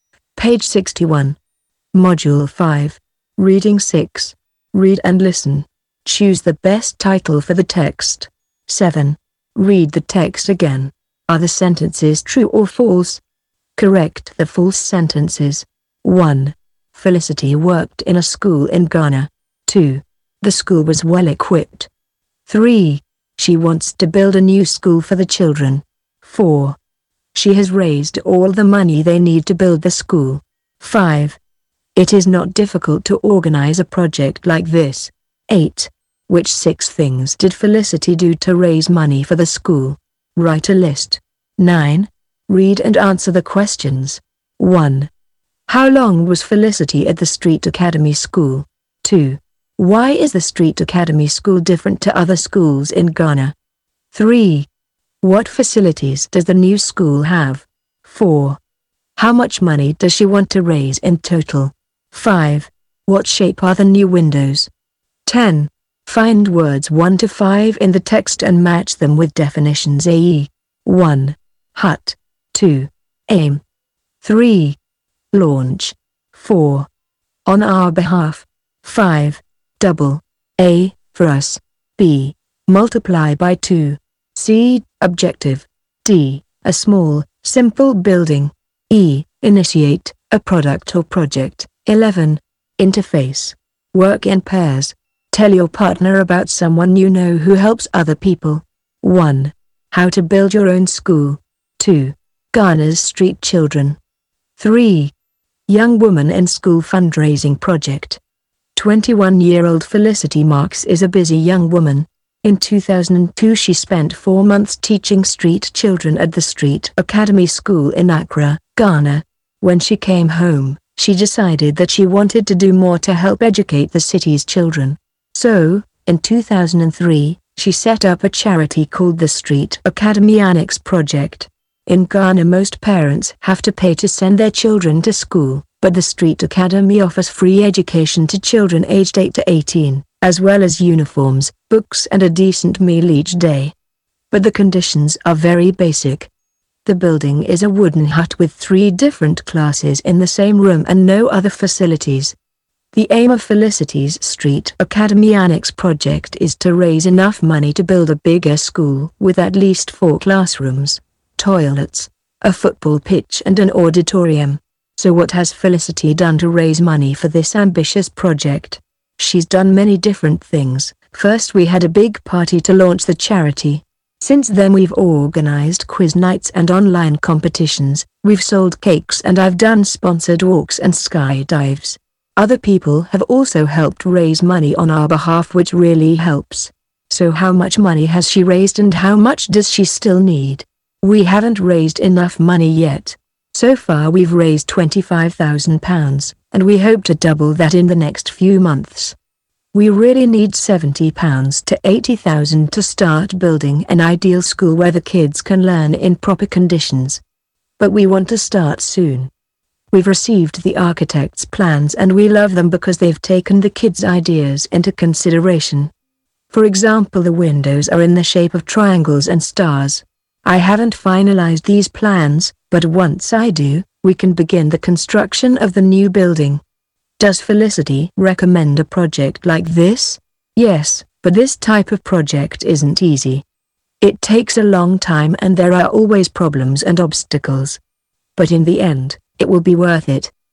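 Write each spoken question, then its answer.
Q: Choose the best title for the text.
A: 3: Young woman in school fundraising project.

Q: Felicity worked in a school in Ghana.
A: True

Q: The school was well equipped.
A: False: conditions are very basic, a wooden hut with no other facilities

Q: She wants to build a new school for the children.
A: True

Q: She has raised all the money they need to build the school.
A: False: she has raised £25,000 but needs £70,000 to £80,000

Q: It is not difficult to organize a project like this.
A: False: this type of project isn't easy

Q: How long was Felicity at the Street Academy School?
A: 4 months

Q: Why is the Street Academy School different to other schools in Ghana?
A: It offers free education to children aged 8 to 18

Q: What facilities does the new school have?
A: At least 4 classrooms, toilets, a football pitch and an auditorium

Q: How much money does she want to raise in total?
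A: £70,000 to £80,000

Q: What shape are the new windows?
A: Triangles and stars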